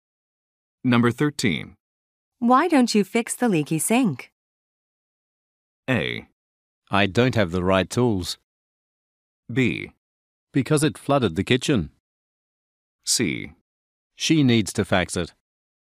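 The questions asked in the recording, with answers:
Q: Why don't you fix the leaky sink?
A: A: I don't have the right tools.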